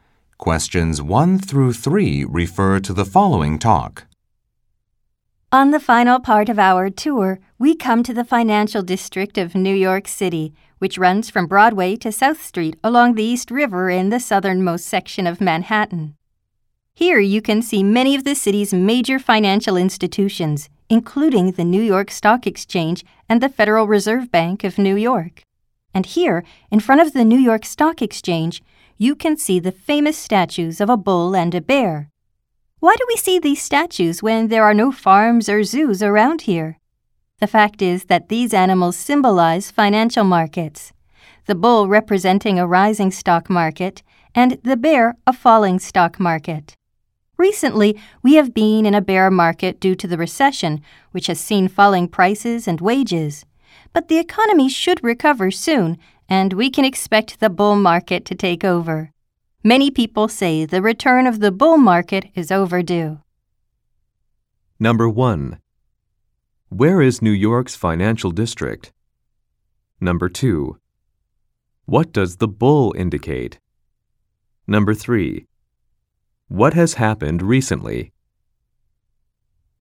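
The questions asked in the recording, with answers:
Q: Where is New York's financial district?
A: In the southernmost section of Manhattan, from Broadway to South Street along the East River

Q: What does the bull indicate?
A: A rising stock market

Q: What has happened recently?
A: A bear market due to the recession, with falling prices and wages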